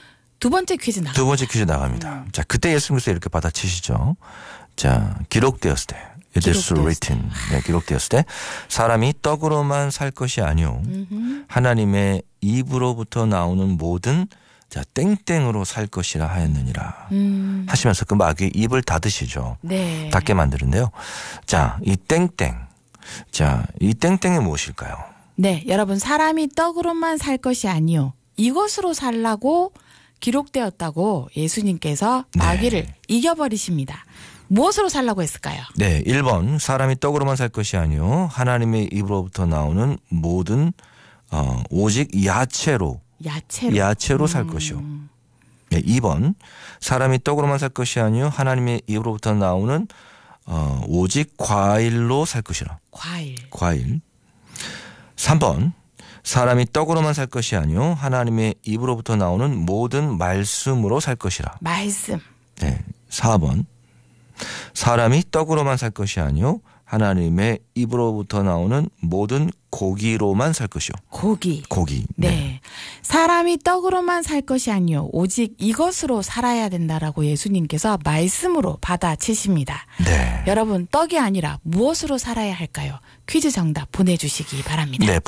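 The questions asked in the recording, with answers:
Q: 여러분, 떡이 아니라 무엇으로 살아야 할까요?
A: 3: 하나님의 입으로부터 나오는 모든 말씀으로 살 것이라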